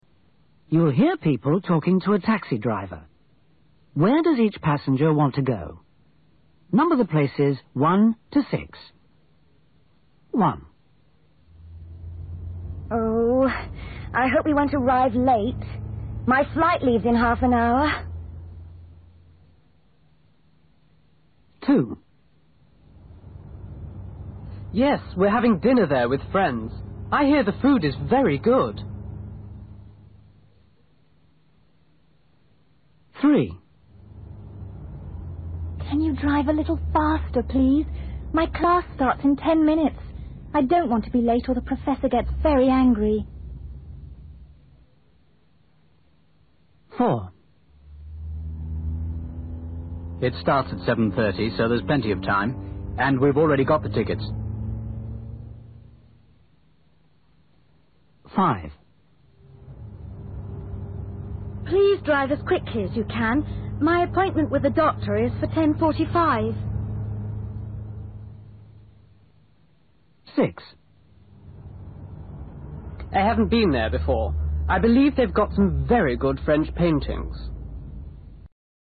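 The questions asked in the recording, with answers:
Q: Where does each passenger want to go?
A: the airport

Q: Where does each passenger want to go?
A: a restaurant

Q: Where does each passenger want to go?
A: the university / college

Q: Where does each passenger want to go?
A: the doctor's surgery

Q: Where does each passenger want to go?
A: the art gallery / museum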